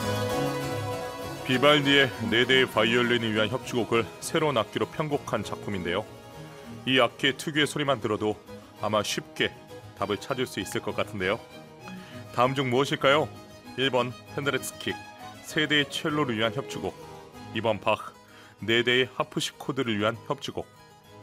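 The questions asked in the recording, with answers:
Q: 다음 중 무엇일까요?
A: 2번: 바흐, 네 대의 하프시코드를 위한 협주곡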